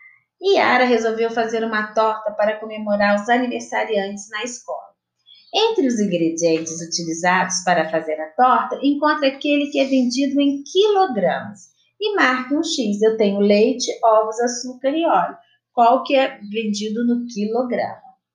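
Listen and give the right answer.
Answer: açúcar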